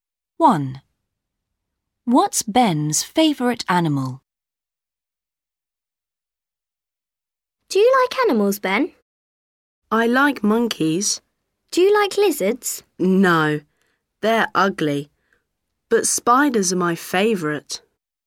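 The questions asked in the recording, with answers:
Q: What's Ben's favourite animal?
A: spiders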